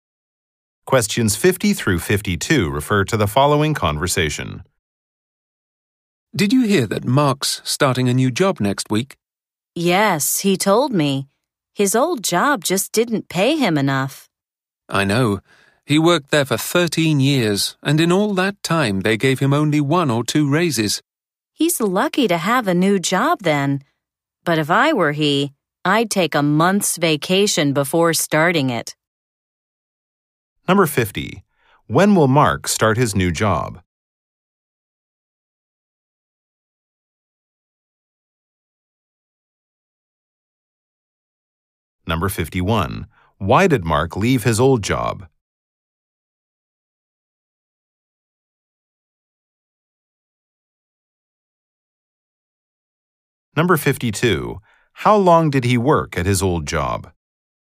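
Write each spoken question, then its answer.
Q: When will Mark start his new job?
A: Next week.

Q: Why did Mark leave his old job?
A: It didn't pay him enough.

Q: How long did he work at his old job?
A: 13 years.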